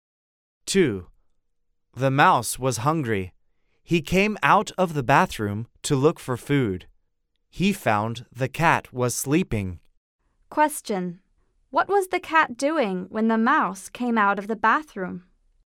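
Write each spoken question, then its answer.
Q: What was the cat doing when the mouse came out of the bathroom?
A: He was sleeping.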